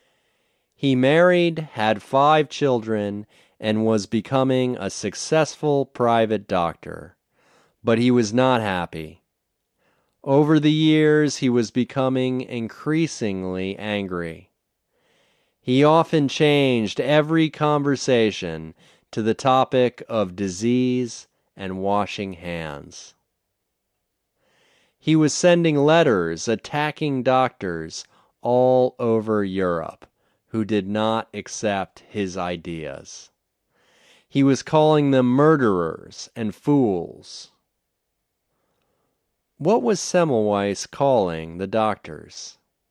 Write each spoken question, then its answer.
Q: What was Semmelweis calling the doctors?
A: He was calling them murderers and fools.